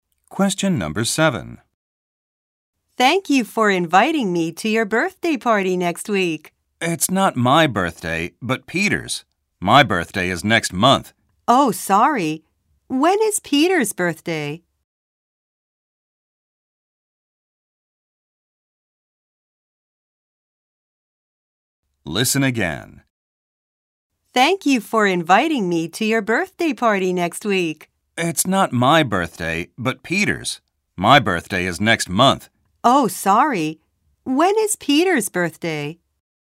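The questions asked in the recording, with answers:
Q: When is Peter's birthday?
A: Next week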